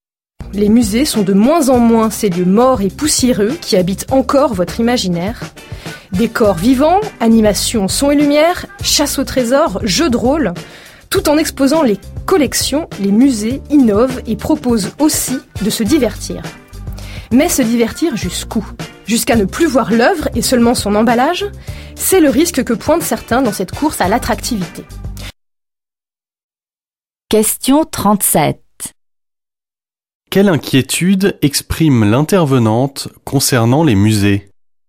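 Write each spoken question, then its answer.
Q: Quelle inquiétude exprime l'intervenante concernant les musées ?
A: Que le divertissement prenne le dessus et qu'on ne voie plus l'œuvre, seulement son emballage.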